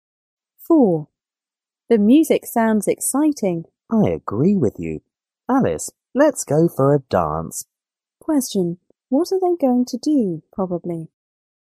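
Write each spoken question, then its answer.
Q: What are they going to do, probably?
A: Go for a dance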